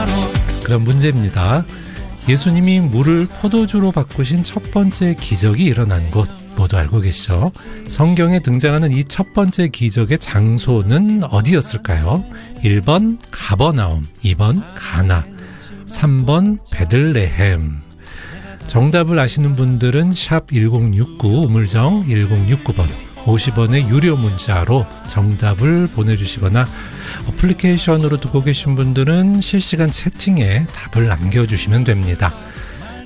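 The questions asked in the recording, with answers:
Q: 성경에 등장하는 이 첫 번째 기적의 장소는 어디였을까요?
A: 2: 가나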